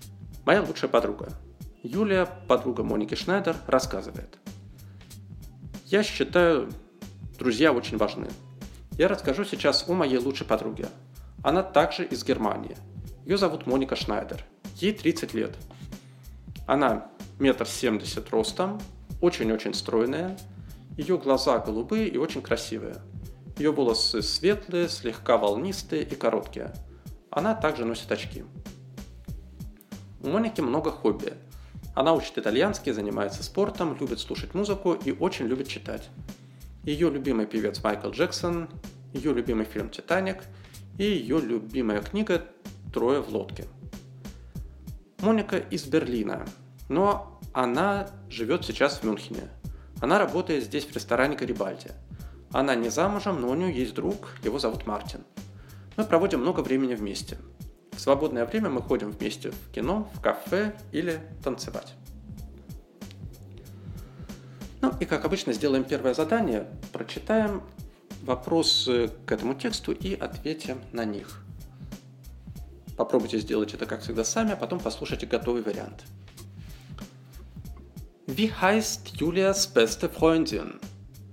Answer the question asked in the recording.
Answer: Julias beste Freundin heißt Monika Schneider.